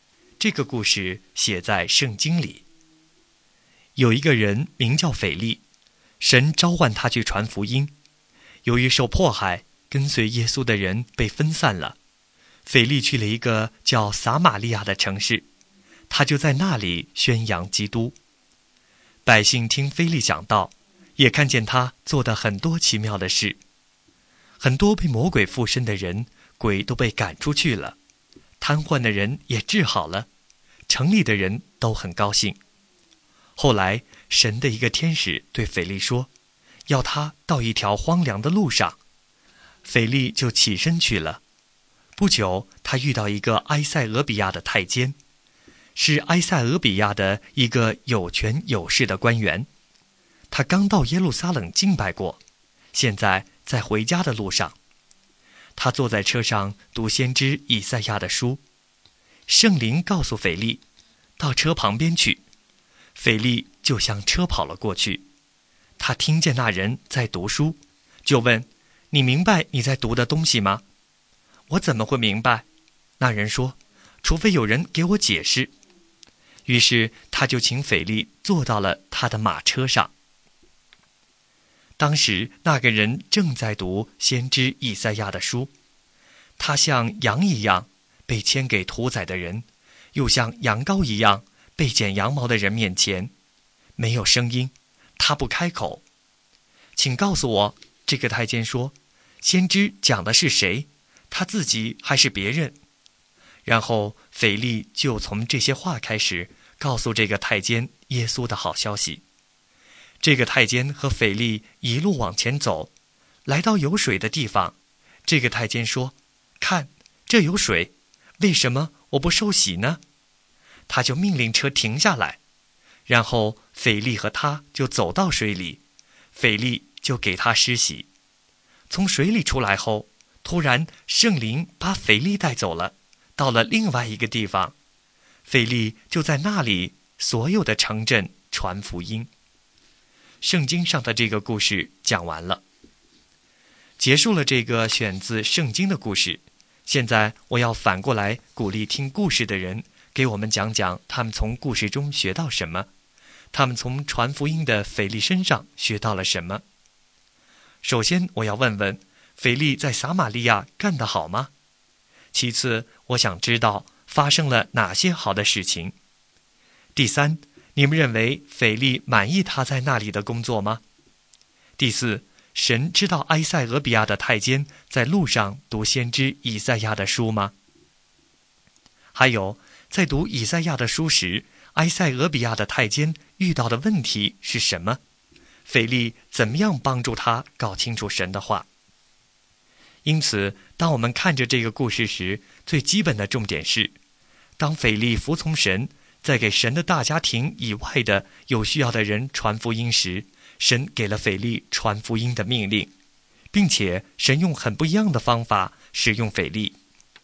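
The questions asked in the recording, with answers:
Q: 首先我要问问,腓力在撒玛利亚干得好吗?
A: 好,很多人听他讲道,鬼被赶出,瘫痪的人被治好

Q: 其次,我想知道发生了哪些好的事情。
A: 被魔鬼附身的人得释放,瘫痪的人被治好,城里的人都很高兴

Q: 还有,在读以赛亚的书时,埃塞俄比亚的太监遇到的问题是什么?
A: 他不明白所读的内容,不知道先知讲的是自己还是别人

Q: 腓力怎么样帮助他搞清楚神的话?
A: 坐上他的车,从那段经文开始给他讲耶稣的好消息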